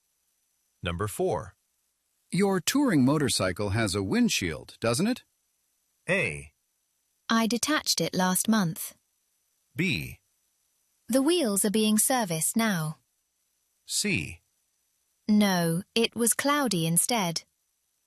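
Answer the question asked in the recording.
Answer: A: I detached it last month.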